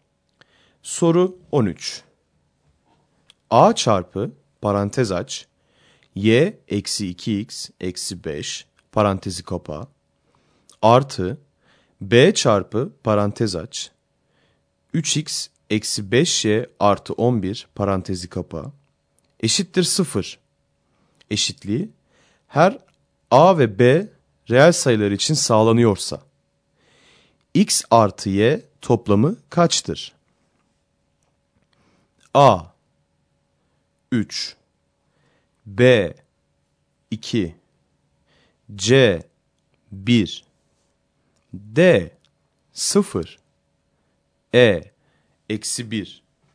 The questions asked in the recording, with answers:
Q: A çarpı parantez aç Y eksi 2X eksi 5 parantezi kapa artı B çarpı parantez aç 3X eksi 5y artı 11 parantezi kapa eşittir 0 eşitliği her a ve b reel sayılar için sağlanıyorsa x artı y toplamı kaçtır?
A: Doğru yanıt E şıkkı.